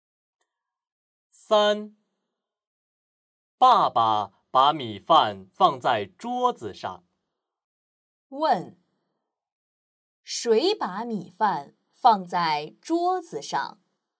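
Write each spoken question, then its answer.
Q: 问,谁把米饭放在桌子上?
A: 爸爸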